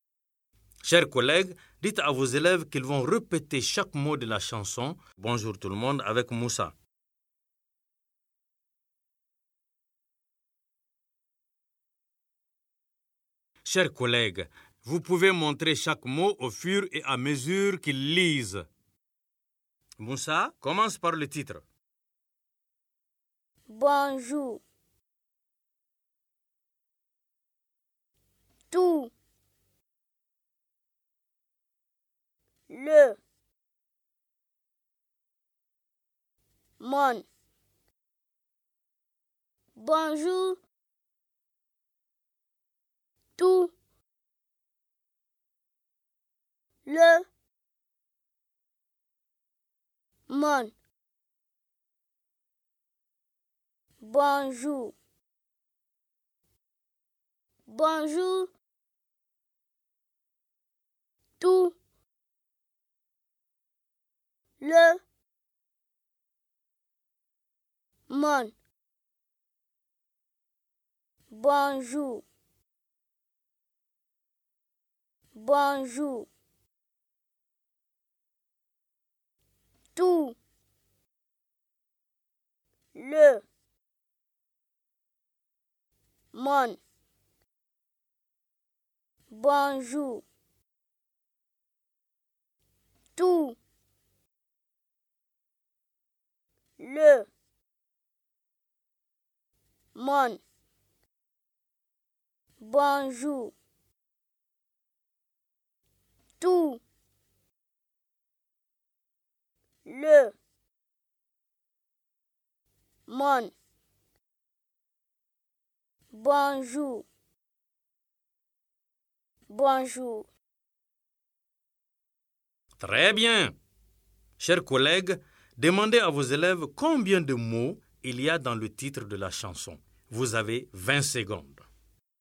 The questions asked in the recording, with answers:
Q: Chers collègues, demandez à vos élèves combien de mots il y a dans le titre de la chanson.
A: Dans Bonjour tout le monde, il y a 4 mots.